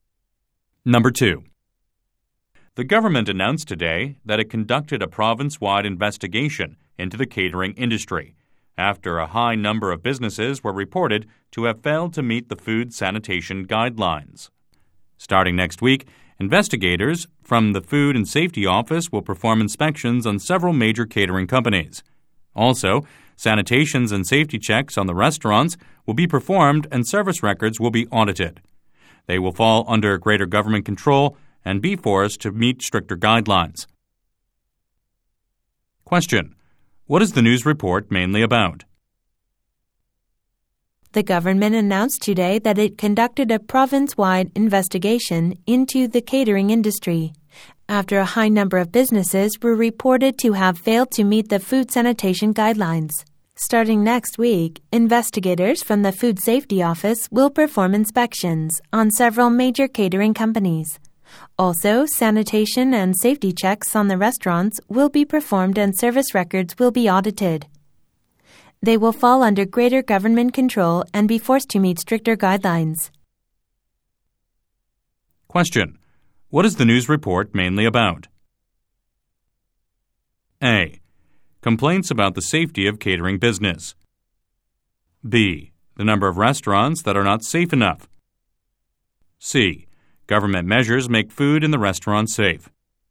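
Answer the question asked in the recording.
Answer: C: Government measures make food in the restaurant safe.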